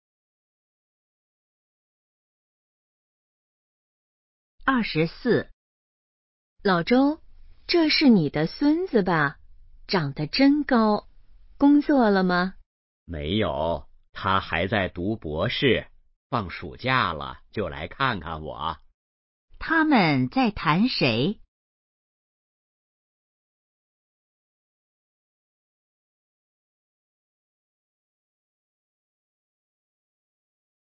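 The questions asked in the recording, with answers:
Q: 他们在谈谁?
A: 老周的孙子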